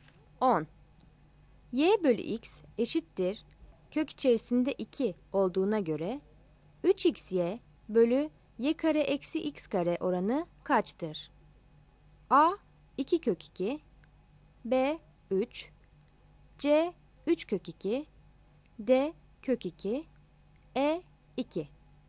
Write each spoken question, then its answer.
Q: Y bölü X eşittir kök içerisinde 2 olduğuna göre 3XY bölü Y kare eksi X kare oranı kaçtır?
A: Yanıt C'dir.